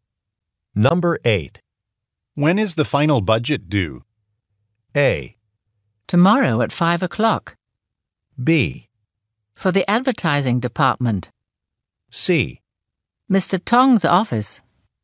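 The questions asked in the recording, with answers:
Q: When is the final budget due?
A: A: Tomorrow at 5 o'clock.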